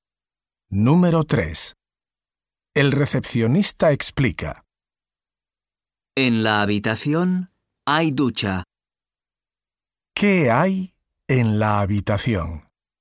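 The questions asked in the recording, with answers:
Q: ¿Qué hay en la habitación?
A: Ducha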